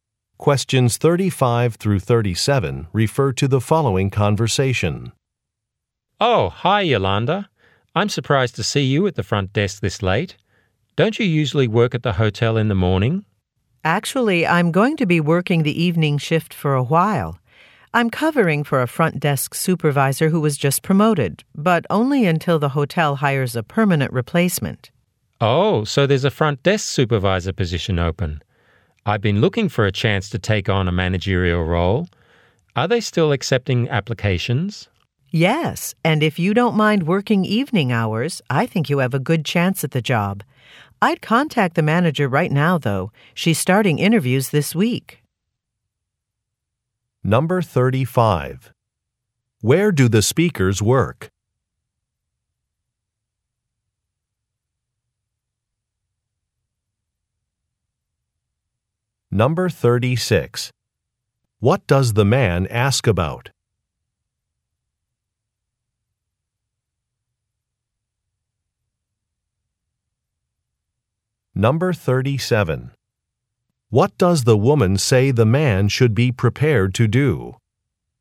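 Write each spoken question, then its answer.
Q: Where do the speakers work?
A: At a hotel

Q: What does the man ask about?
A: Whether applications are still being accepted for the front desk supervisor job

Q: What does the woman say the man should be prepared to do?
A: Work evening hours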